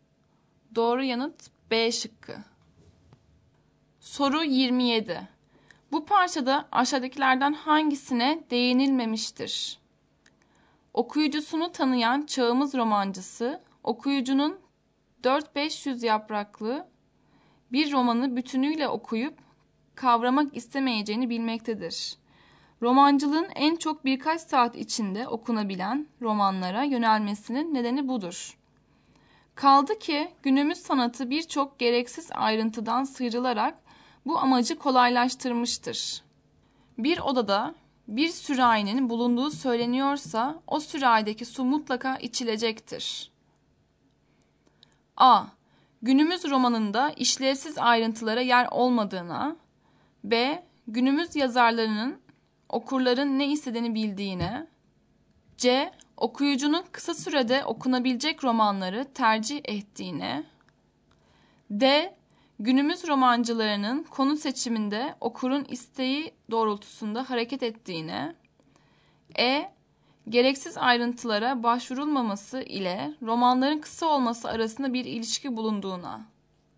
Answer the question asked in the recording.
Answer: Doğru yanıt D şıkkı.